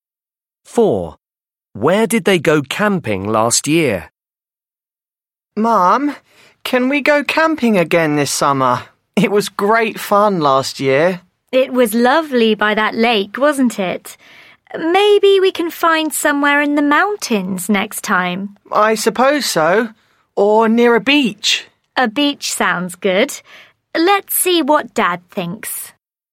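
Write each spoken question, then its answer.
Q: Where did they go camping last year?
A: by a lake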